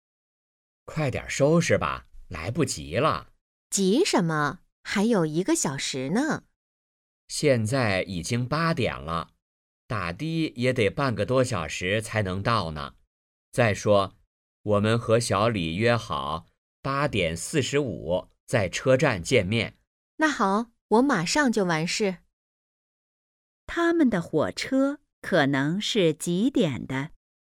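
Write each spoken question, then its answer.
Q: 他们的火车可能是几点的?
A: 9点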